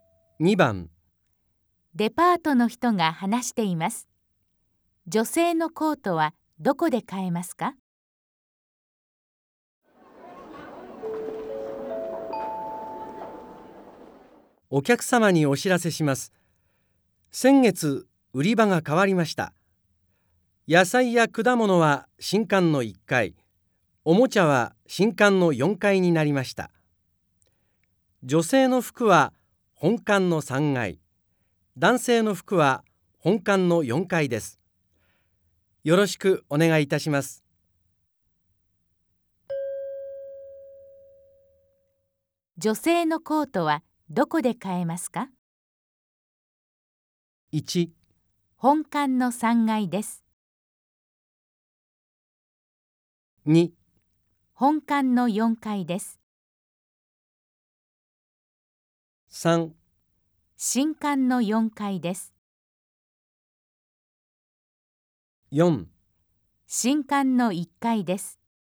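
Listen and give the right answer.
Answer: 1: 本館の3階です。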